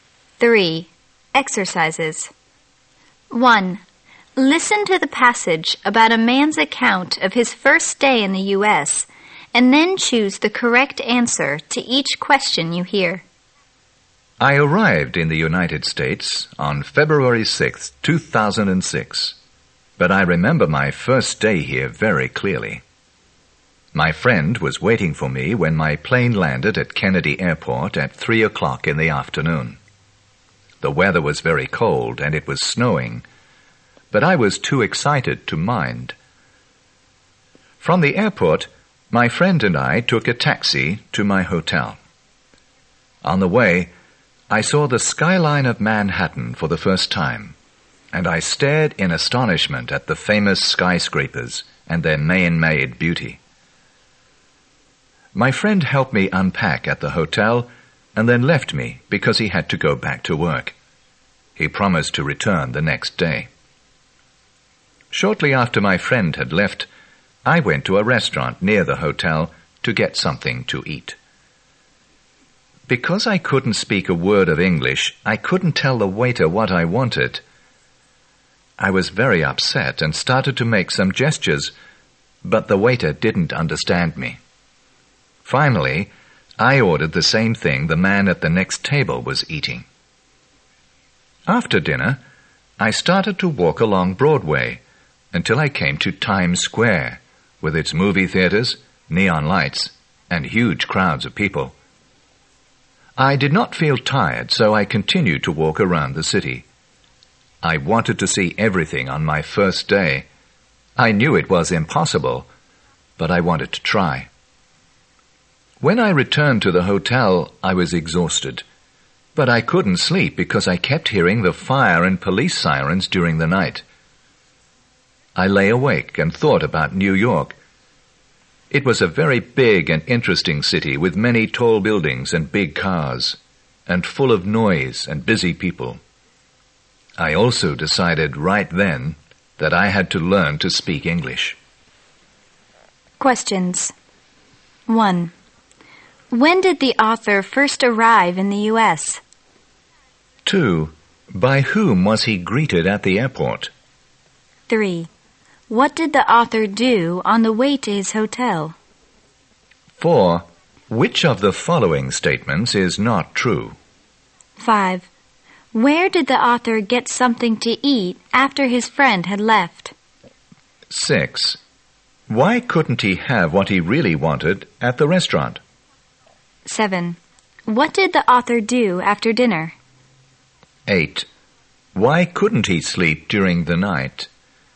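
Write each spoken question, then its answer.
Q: When did the author first arrive in the U.S.?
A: February 6, 2006

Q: By whom was he greeted at the airport?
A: His friend

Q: What did the author do on the way to his hotel?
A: He saw the Manhattan skyline for the first time

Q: Where did the author get something to eat after his friend had left?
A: At a restaurant near the hotel

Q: Why couldn't he have what he really wanted at the restaurant?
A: He couldn't speak any English

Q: What did the author do after dinner?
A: He walked along Broadway to Times Square and around the city

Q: Why couldn't he sleep during the night?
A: He kept hearing fire and police sirens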